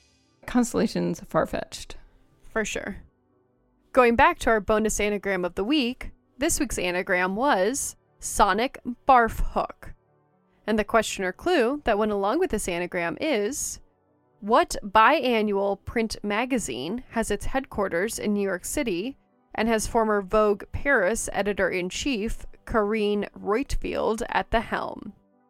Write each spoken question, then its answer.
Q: what biannual print magazine has its headquarters in New York City and has former Vogue Paris editor-in-chief Karine Reutfeld at the helm?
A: And the answer is CR Fashion Book.